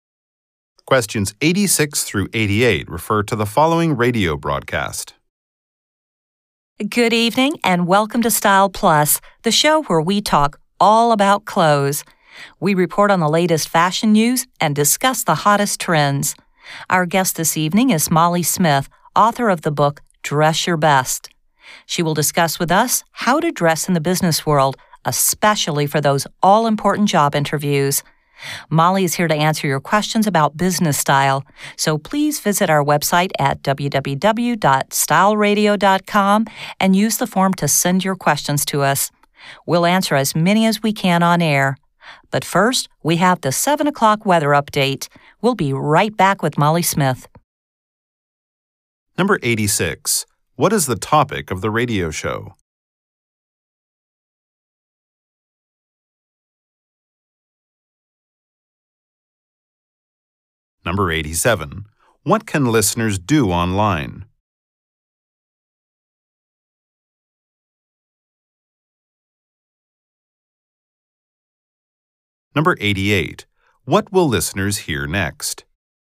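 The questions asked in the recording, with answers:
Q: What is the topic of the radio show?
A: Clothes and fashion

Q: What can listeners do online?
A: Send questions

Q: What will listeners hear next?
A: A weather update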